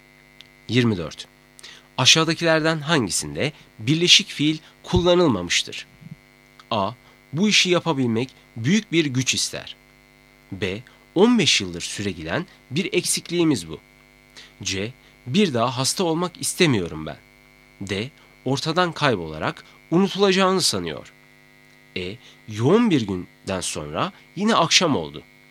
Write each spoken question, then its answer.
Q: Aşağıdakilerden hangisinde birleşik fiil kullanılmamıştır?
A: Doğru cevap E. Yoğun bir günden sonra yine akşam oldu.